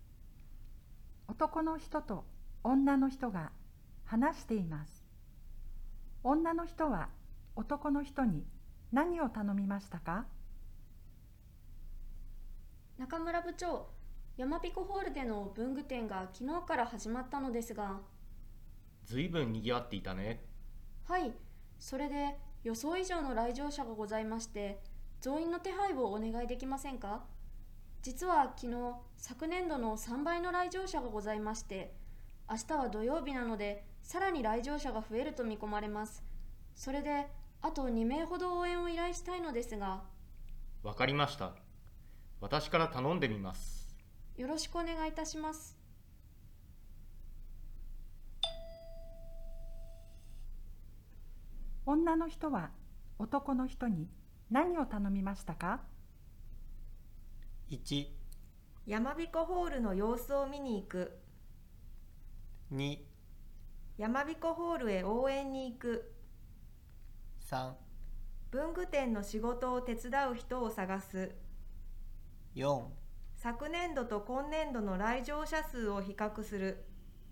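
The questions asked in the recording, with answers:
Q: 女の人は男の人に何を頼みましたか?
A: 3: 文具店の仕事を手伝う人を探す。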